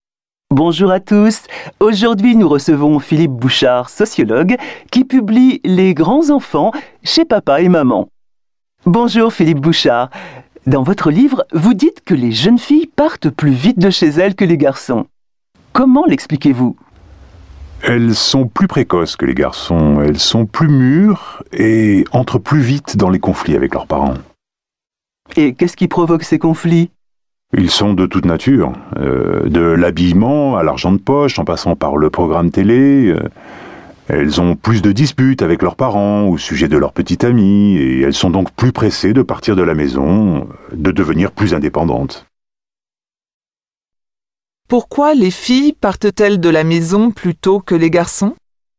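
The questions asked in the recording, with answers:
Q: Pourquoi les filles partent-elles de la maison plutôt que les garçons?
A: Elles sont plus précoces et plus mûres, elles entrent plus vite en conflit avec leurs parents et veulent devenir indépendantes.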